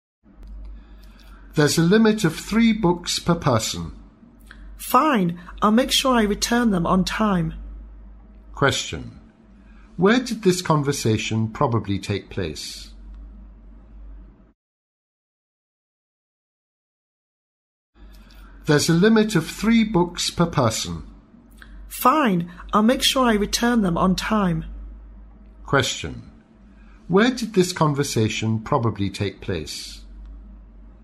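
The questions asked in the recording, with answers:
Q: Where did this conversation probably take place?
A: In a library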